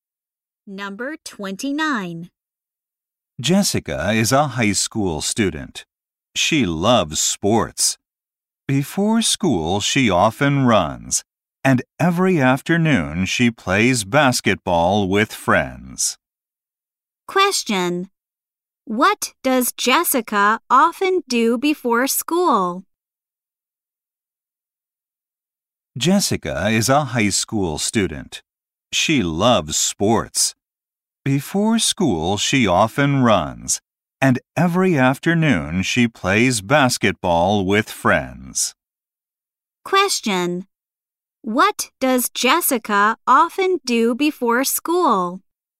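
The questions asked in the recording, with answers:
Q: What does Jessica often do before school?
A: She runs.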